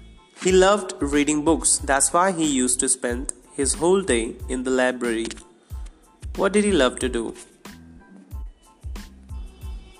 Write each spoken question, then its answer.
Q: What did he love to do?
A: He loved to read books.